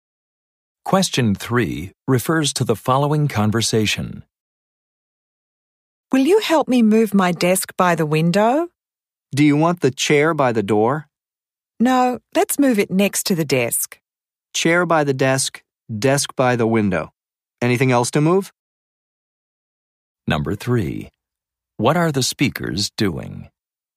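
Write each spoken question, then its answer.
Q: What are the speakers doing?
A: Moving furniture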